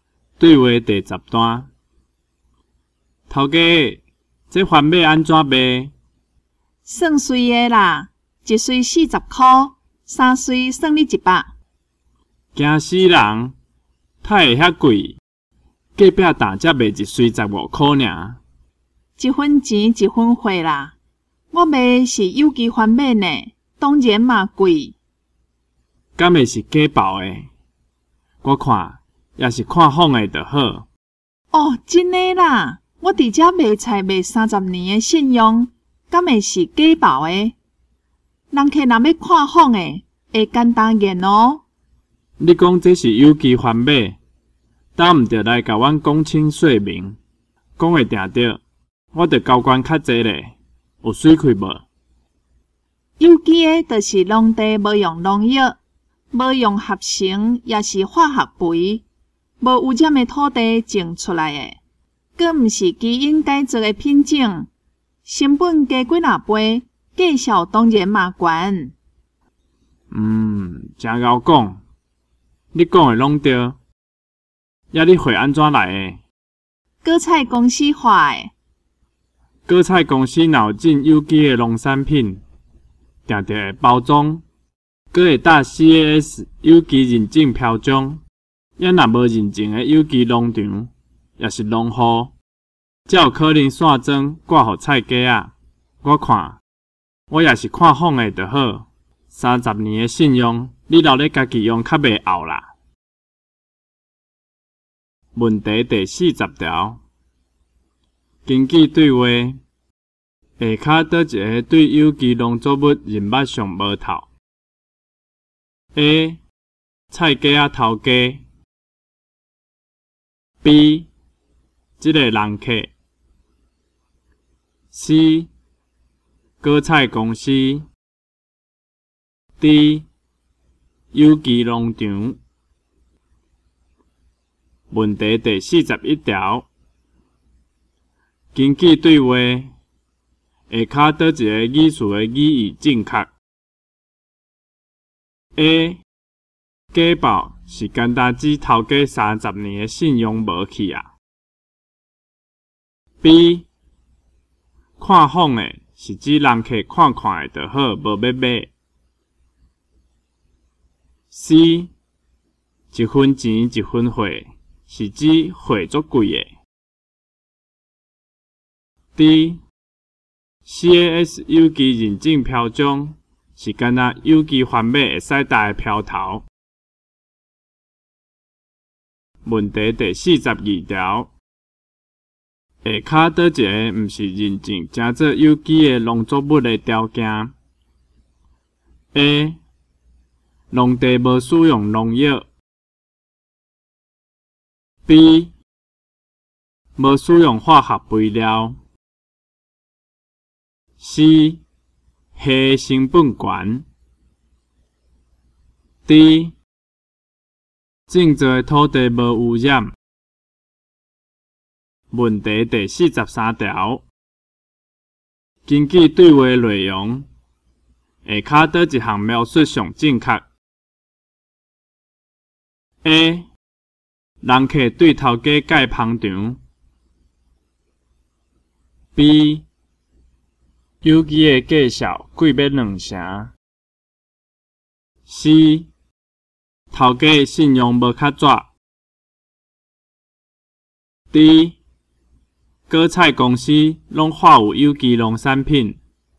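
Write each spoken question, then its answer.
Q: 下骹倒一个毋是认证正做有机的农作物的条件 ?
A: C: 虾成本悬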